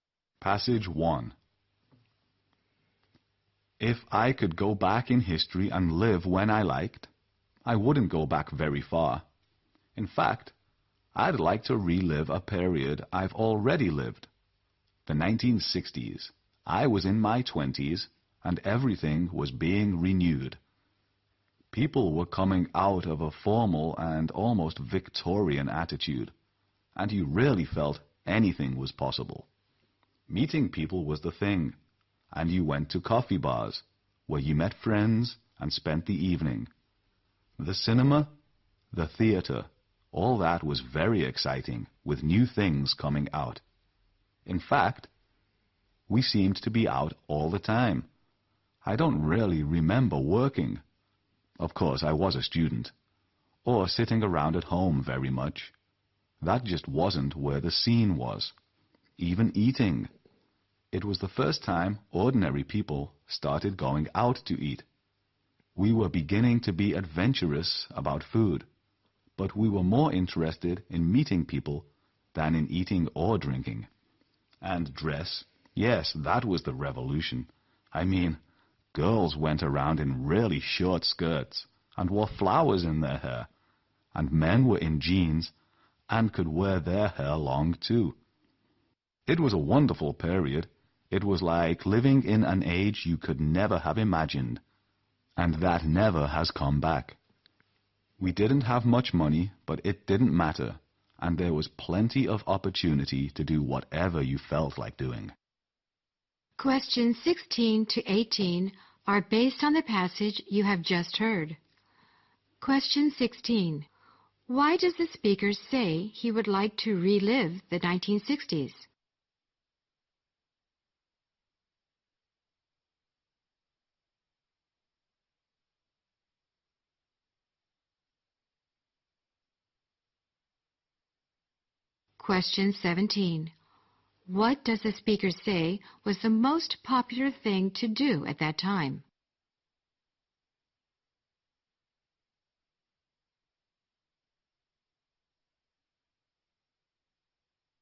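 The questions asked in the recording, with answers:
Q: Why does the speaker say he would like to relive the 1960s?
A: Everything was being renewed and anything seemed possible

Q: What does the speaker say was the most popular thing to do at that time?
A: Meeting people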